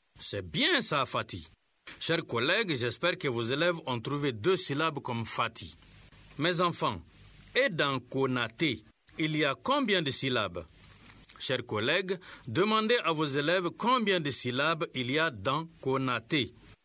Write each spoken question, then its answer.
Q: Mes enfants, et dans « Konaté », il y a combien de syllabes ?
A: Monsieur, dans Konaté, il y a 3 syllabes.